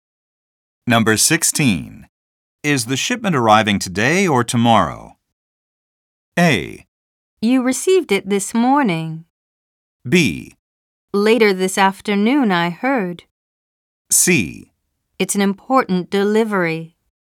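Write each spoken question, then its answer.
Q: Is the shipment arriving today or tomorrow?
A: B: Later this afternoon, I heard.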